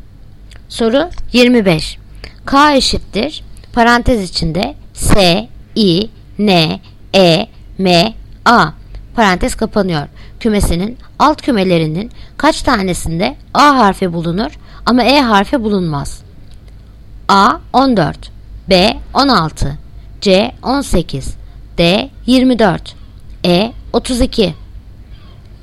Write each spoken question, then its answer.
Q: Kümesinin alt kümelerinin kaç tanesinde A harfi bulunur ama E harfi bulunmaz?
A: Yanıt Bursa. 16.